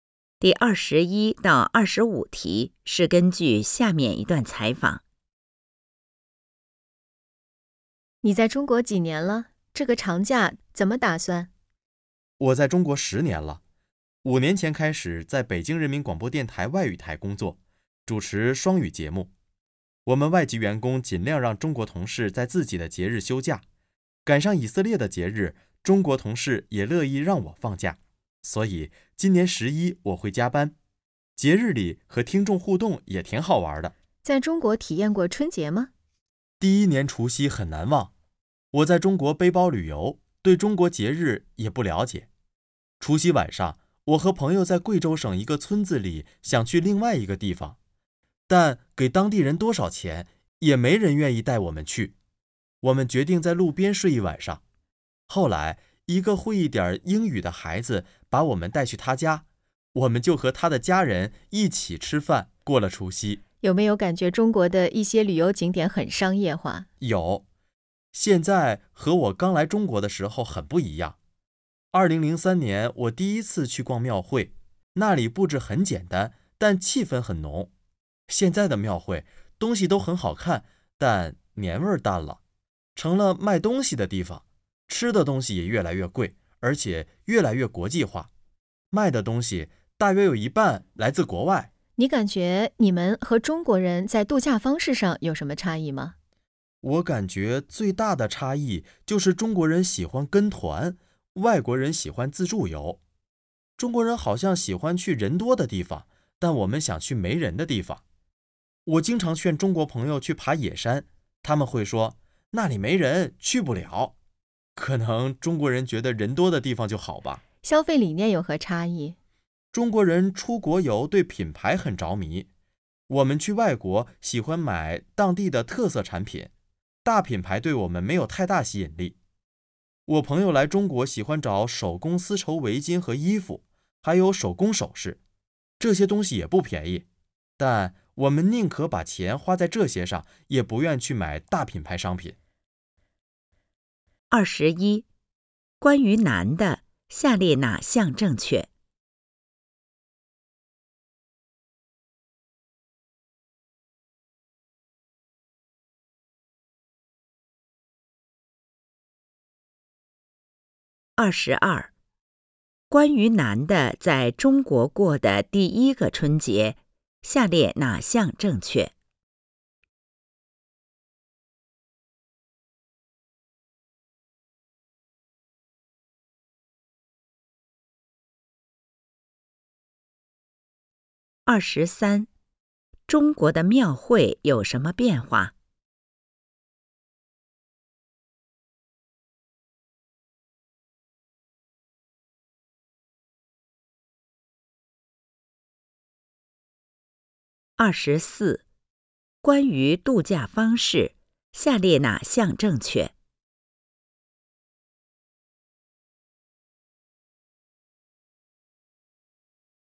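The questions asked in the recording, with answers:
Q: 中国的庙会有什么变化?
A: 变得商业化,年味淡了,东西越来越贵、越来越国际化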